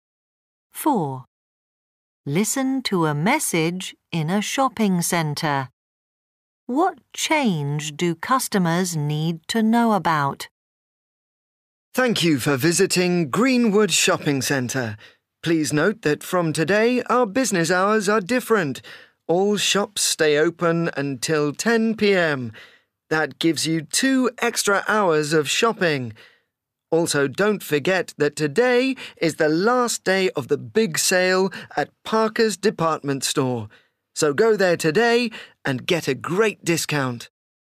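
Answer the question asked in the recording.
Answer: The shops now stay open until 10 p.m. (new business hours).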